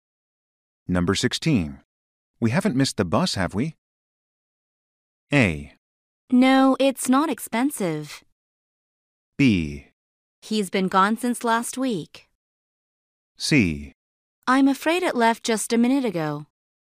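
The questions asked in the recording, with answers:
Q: We haven't missed the bus, have we?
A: C: I'm afraid it left just a minute ago.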